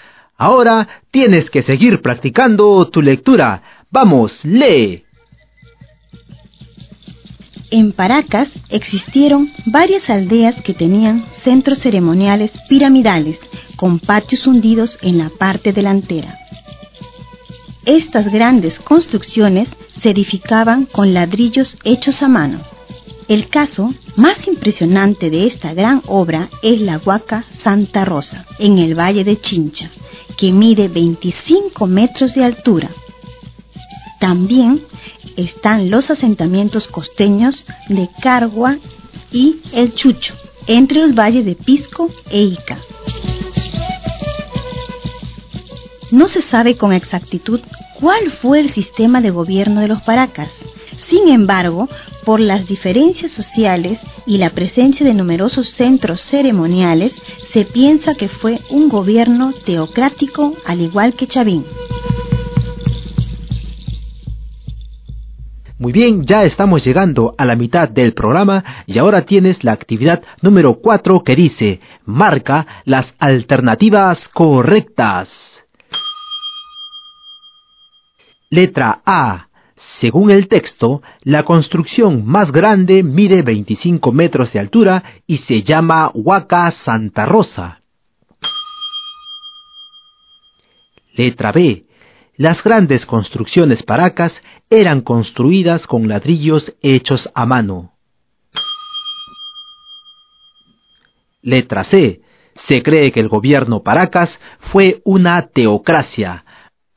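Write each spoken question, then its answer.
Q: Según el texto, la construcción más grande mide 25 metros de altura y se llama Huaca Santa Rosa.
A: Verdadero

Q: Las grandes construcciones paracas eran construidas con ladrillos hechos a mano.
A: Verdadero

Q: Se cree que el gobierno Paracas fue una teocracia.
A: Verdadero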